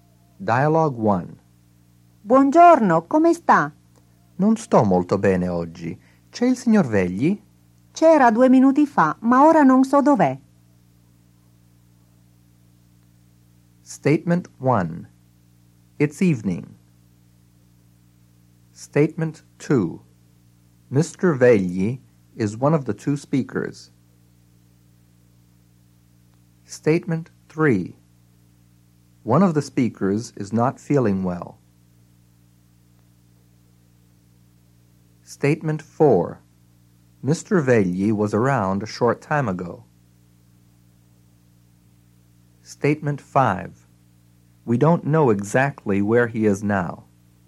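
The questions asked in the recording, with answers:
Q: It's evening.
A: False

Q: Mr. Vegli is one of the two speakers.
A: False

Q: One of the speakers is not feeling well.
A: True

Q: Mr. Vegli was around a short time ago.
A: True

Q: We don't know exactly where he is now.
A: True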